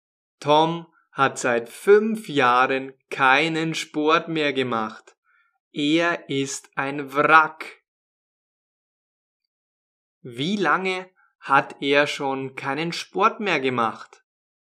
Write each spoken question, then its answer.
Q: Wie lange hat er schon keinen Sport mehr gemacht?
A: Seit fünf Jahren.